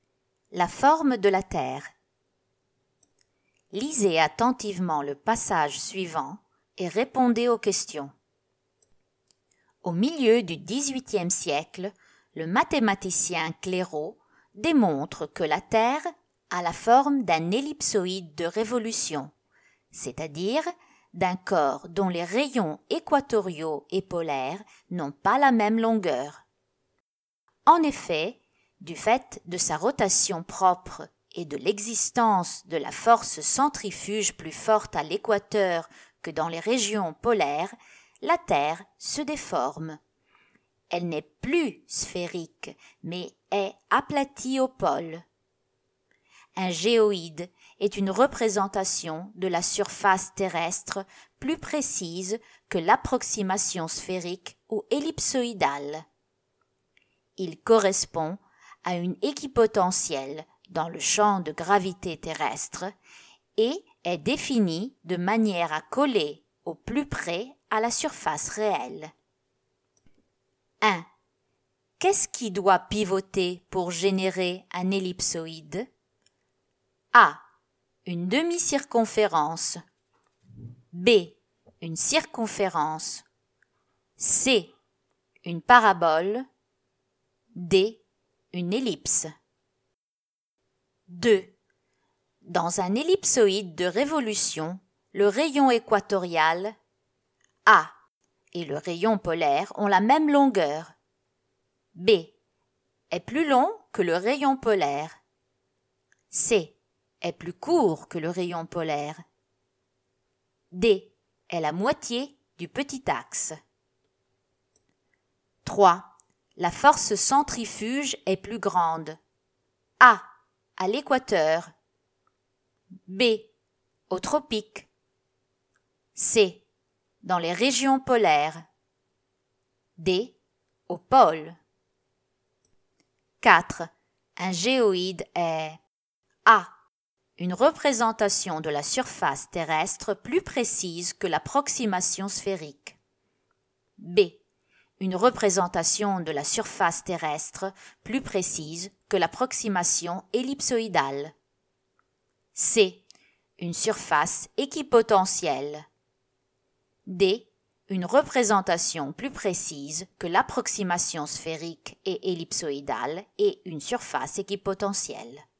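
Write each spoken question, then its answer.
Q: Dans un ellipsoïde de révolution, le rayon équatorial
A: B: est plus long que le rayon polaire.

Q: La force centrifuge est plus grande.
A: A: À l'équateur.

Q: Un géoïde est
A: D: Une représentation plus précise que l'approximation sphérique et ellipsoïdale et une surface équipotentielle.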